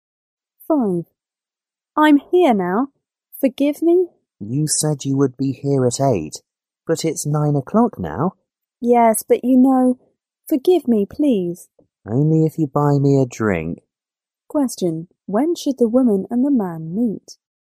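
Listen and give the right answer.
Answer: At 8 o'clock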